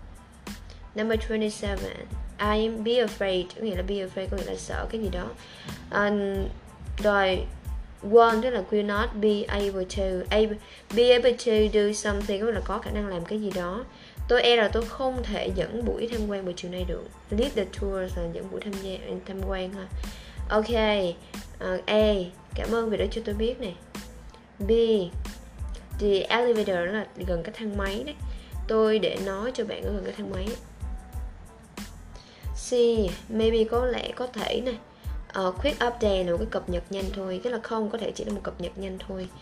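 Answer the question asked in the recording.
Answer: A: Cảm ơn vì đã cho tôi biết.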